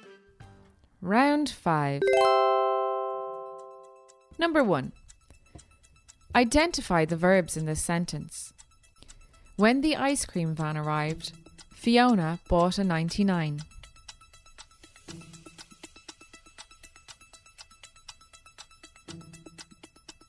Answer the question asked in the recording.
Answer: The first verb is arrived, and the second is bought.